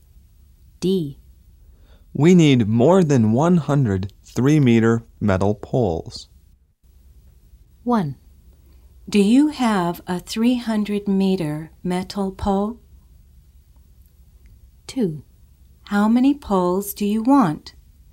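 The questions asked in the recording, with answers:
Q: Do you have a 300-meter metal pole?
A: No, we need over 100 3-meter poles

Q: How many poles do you want?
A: More than 100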